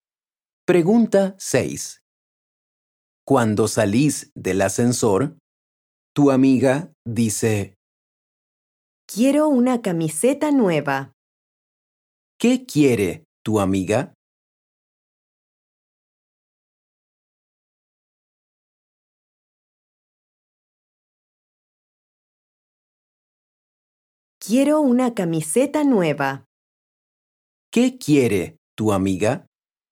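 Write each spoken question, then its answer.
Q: ¿Qué quiere tu amiga?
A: una camiseta nueva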